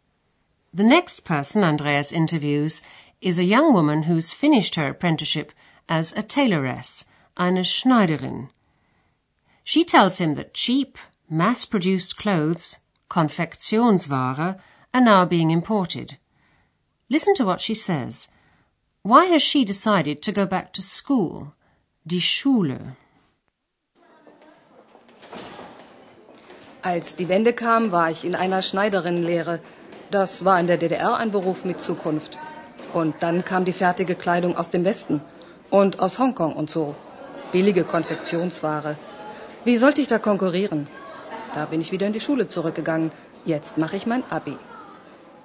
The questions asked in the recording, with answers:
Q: Listen to what she says – why has she decided to go back to school?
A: She reckoned that in her job she couldn't compete with cheap, mass produced clothes.